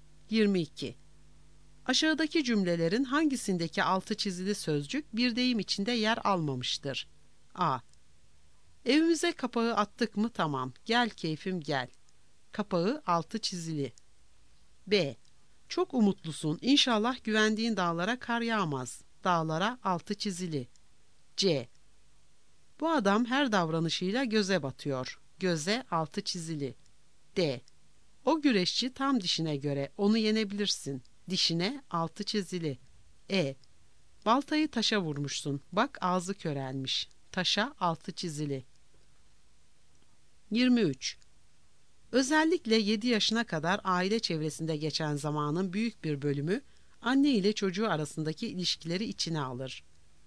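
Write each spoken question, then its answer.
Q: Aşağıdaki cümlelerin hangisindeki altı çizili sözcük bir deyim içinde yer almamıştır?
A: E: Baltayı taşa vurmuşsun, bak ağzı körelmiş.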